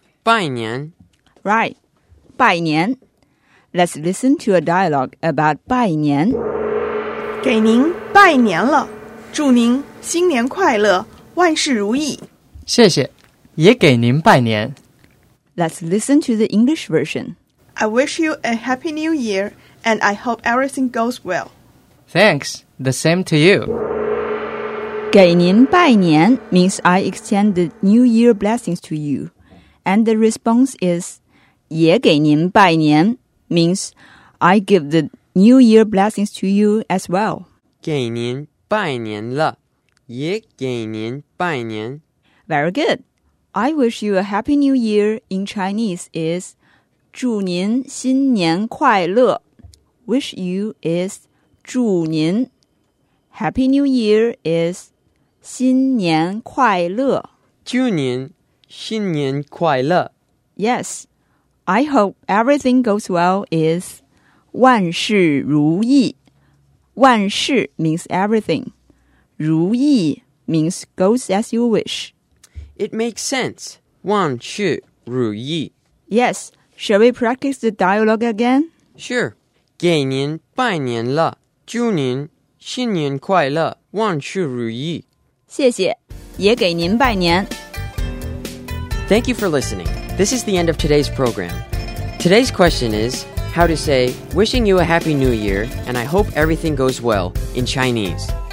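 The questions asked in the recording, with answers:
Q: Today's question is how to say wishing you a happy new year and I hope everything goes well in Chinese.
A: 祝您新年快乐,万事如意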